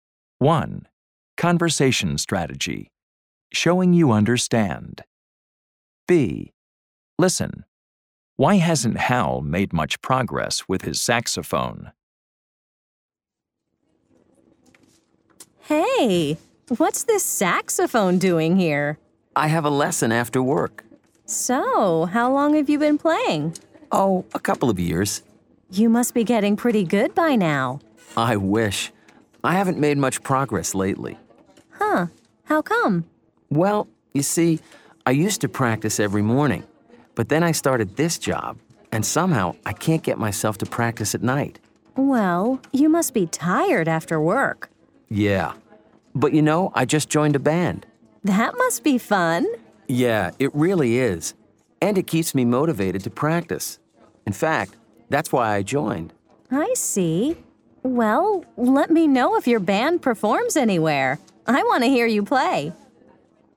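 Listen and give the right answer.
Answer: He started a job and can't get himself to practice at night.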